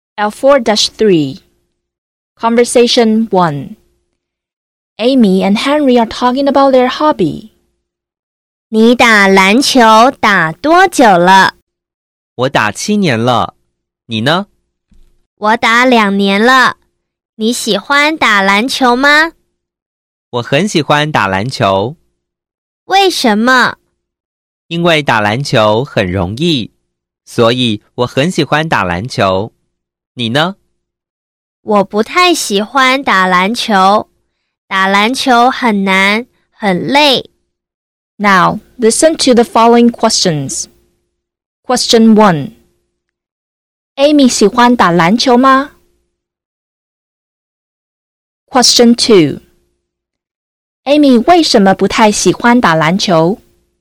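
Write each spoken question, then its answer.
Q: Amy 喜欢打篮球吗?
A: 不太喜欢

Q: Amy 为什么不太喜欢打篮球?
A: 因为打篮球很难,很累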